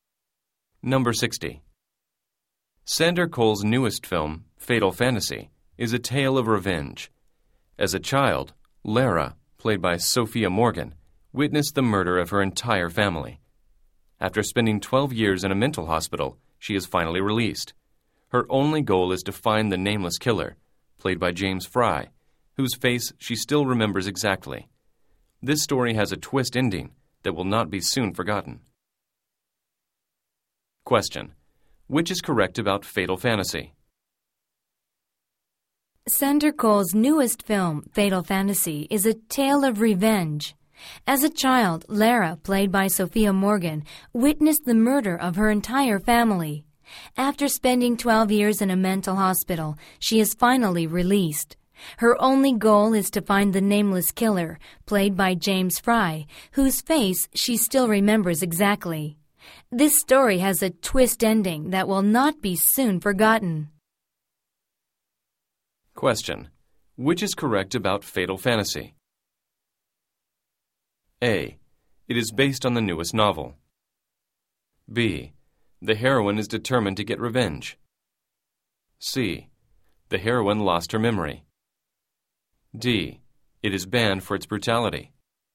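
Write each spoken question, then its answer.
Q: which is correct about Fatal Fantasy?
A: B: The heroine is determined to get revenge.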